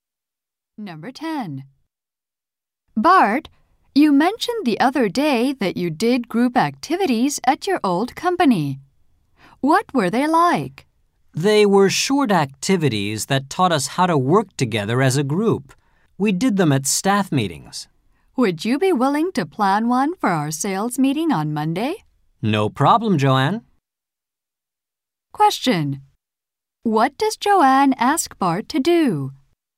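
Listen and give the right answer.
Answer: Plan a group activity for the sales meeting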